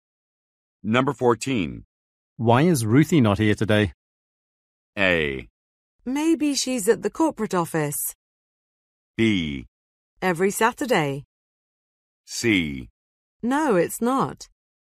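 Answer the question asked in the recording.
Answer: A: Maybe she's at the corporate office.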